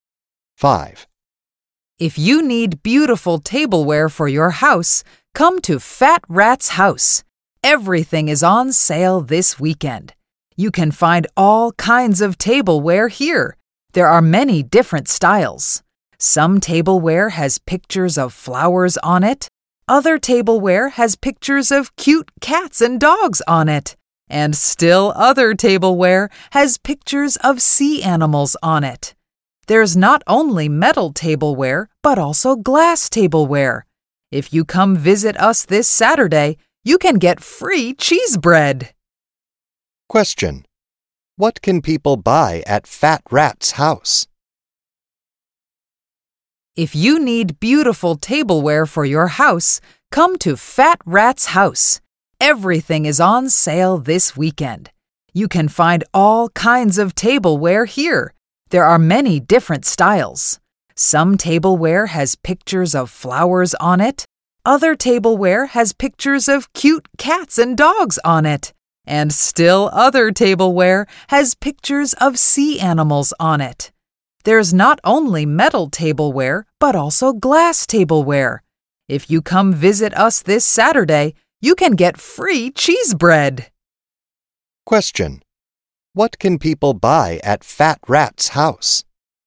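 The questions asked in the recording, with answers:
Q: What can people buy at Fat Rat's house?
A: Tableware (metal and glass, in many styles)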